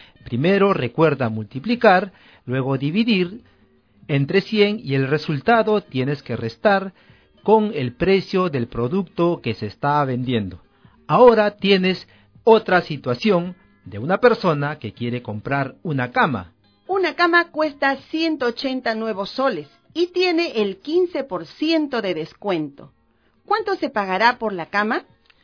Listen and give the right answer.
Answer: se pagará 153 soles.